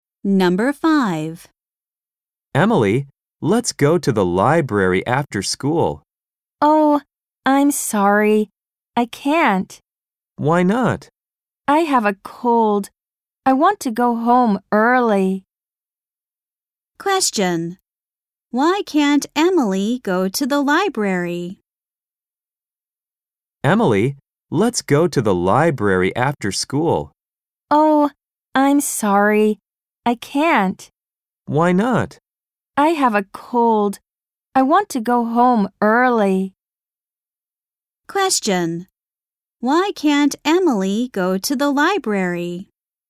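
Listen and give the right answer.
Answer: Because she has a cold.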